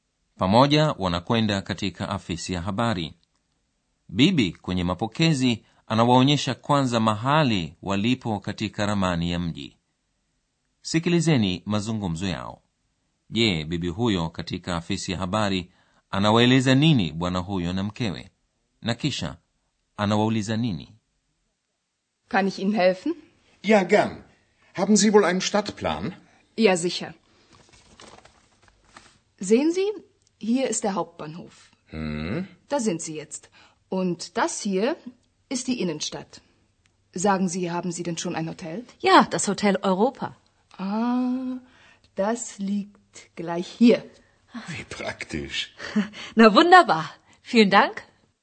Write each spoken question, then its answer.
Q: je bibi huyo katika afisi ya habari anawaeleza nini bwana huyo na mkewe na kisha anawauliza nini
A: kwanza bibi huyo anawaonyesha bwana huyo na mkewe mahali walipo kwenye ramani ya mji kisha anawauliza kama wamekwisha pata hoteli